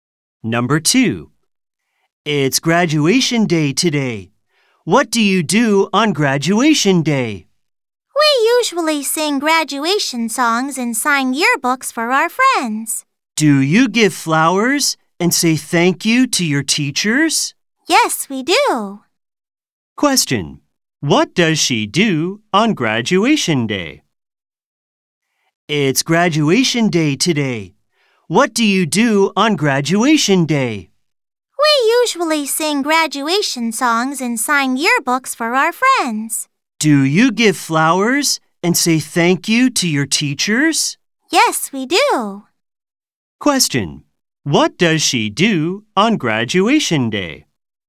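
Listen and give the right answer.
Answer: Sings graduation songs, signs yearbooks, gives flowers and says thank you to teachers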